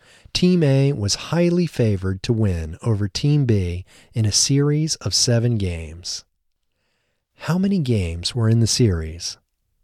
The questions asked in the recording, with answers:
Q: How many games were in the series?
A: There were 7 games in the series.